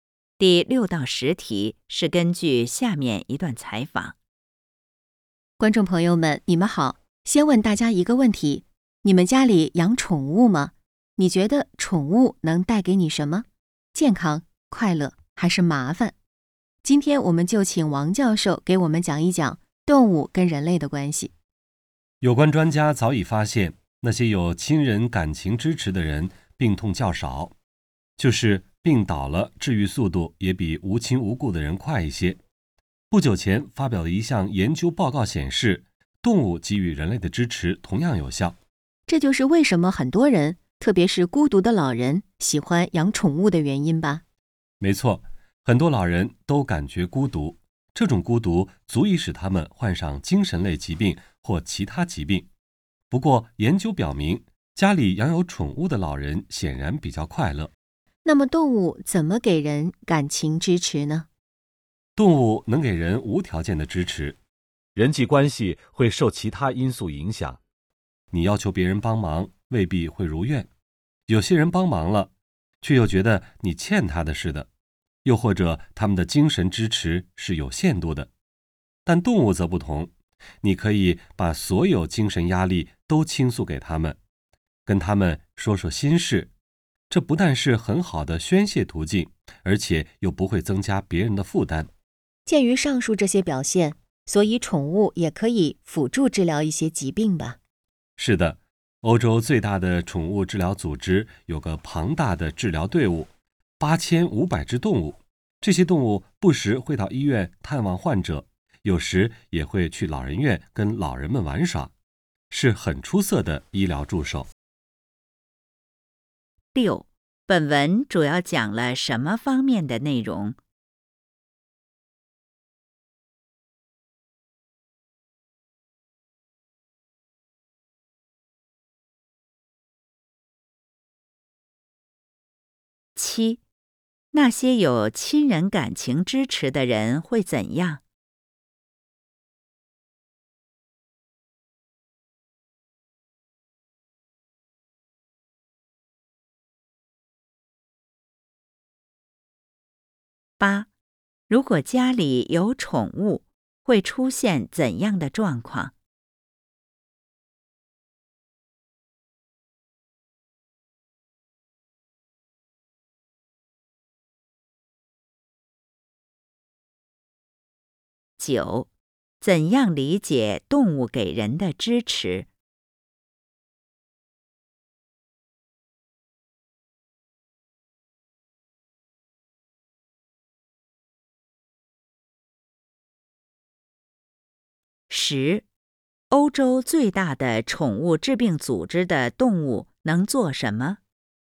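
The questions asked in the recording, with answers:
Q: 本文主要讲了什么方面的内容?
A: 动物(宠物)跟人类的关系

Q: 那些有亲人感情支持的人会怎样?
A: 病痛较少,病倒了治愈速度也更快

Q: 如果家里有宠物,会出现怎样的状况?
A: 老人会比较快乐

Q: 怎样理解动物给人的支持?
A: 动物给人的支持是无条件的

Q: 欧洲最大的宠物治病组织的动物能做什么?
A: 到医院探望患者,去老人院陪老人玩耍,做医疗助手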